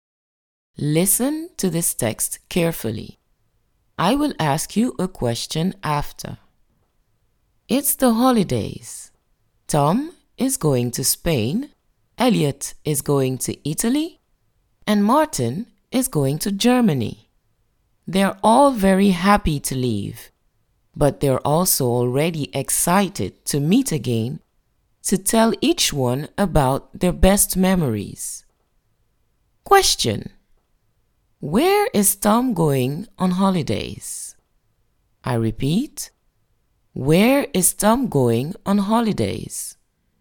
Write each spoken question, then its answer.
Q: where is Tom going on holidays?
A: Tom is going to Spain on holidays.